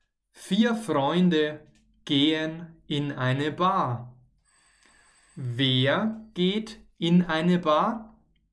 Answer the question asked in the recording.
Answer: Vier Freunde natürlich. Vier Freunde gehen in eine Bar.